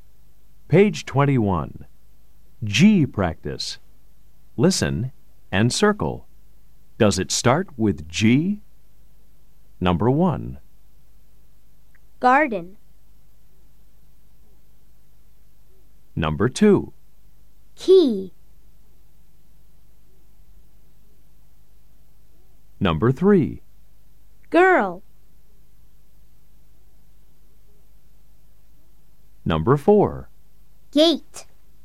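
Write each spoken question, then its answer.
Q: Does it start with G? Number 1. Garden.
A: Yes

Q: Girl.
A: Yes

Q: Gate.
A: Yes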